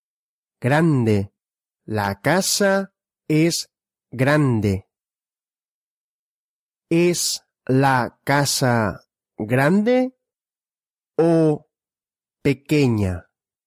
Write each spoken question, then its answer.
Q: ¿Es la casa grande o pequeña?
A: grande. La casa es grande.